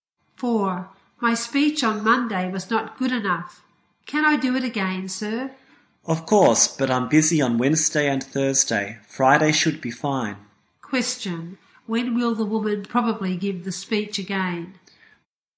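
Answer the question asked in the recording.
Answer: On Friday.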